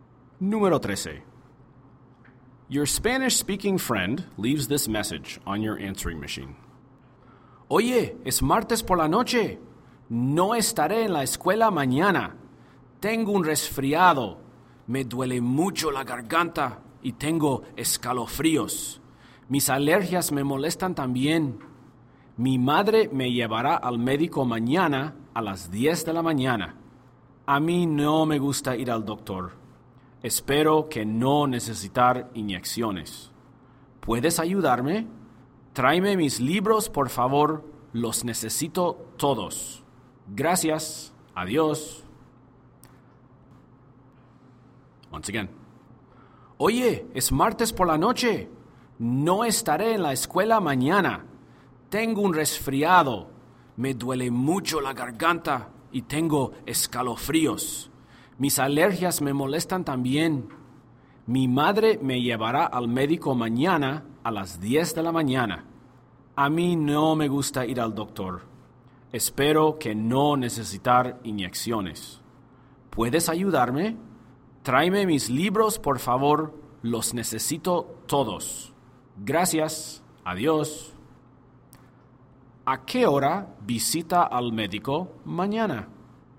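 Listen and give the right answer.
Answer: A las 10 de la mañana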